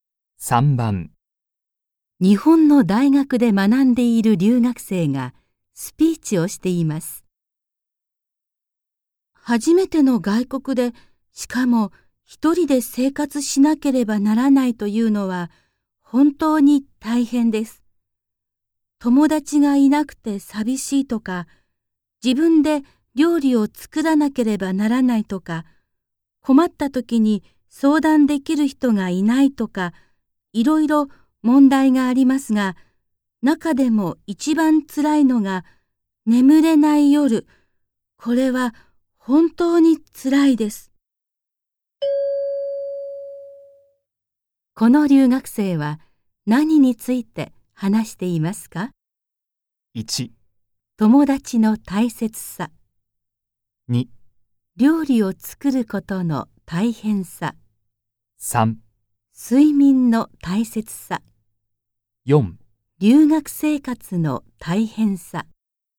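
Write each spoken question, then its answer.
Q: この留学生は何について話していますか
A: 4: 留学生活の大変さ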